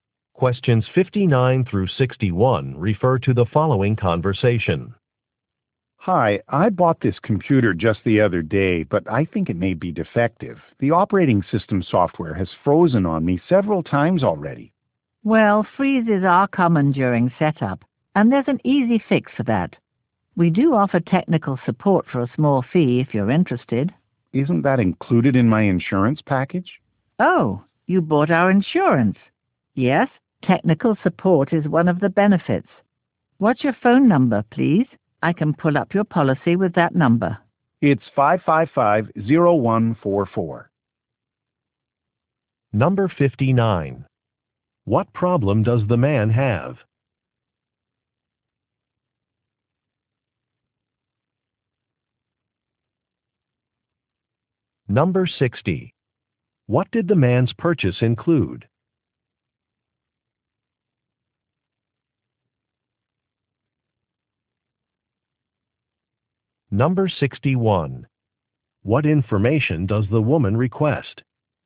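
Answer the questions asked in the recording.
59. His new computer's software keeps freezing
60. An insurance package that includes technical support
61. His phone number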